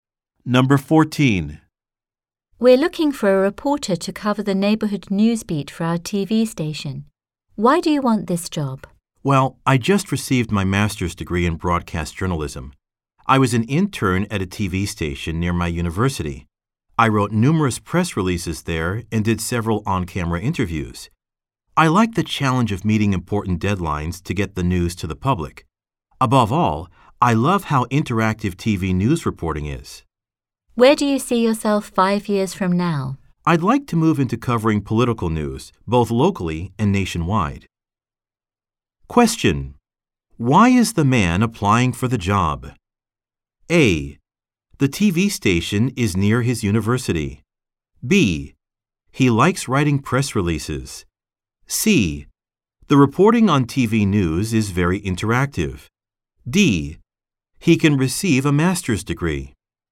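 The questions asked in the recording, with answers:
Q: Why is the man applying for the job?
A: C: The reporting on TV news is very interactive.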